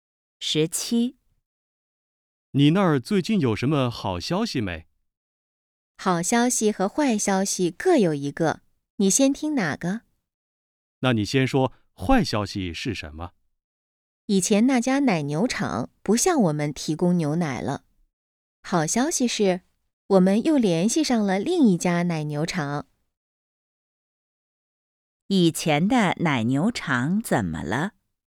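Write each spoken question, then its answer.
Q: 以前的奶牛场怎么了?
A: 不再提供牛奶了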